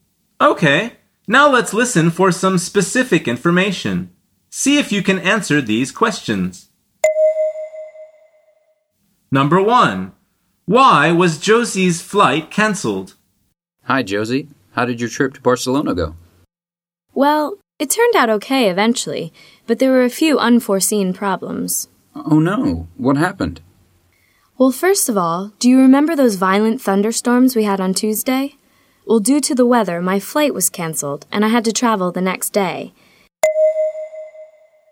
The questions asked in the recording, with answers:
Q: Why was Josie's flight cancelled?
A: The answer is because of the weather.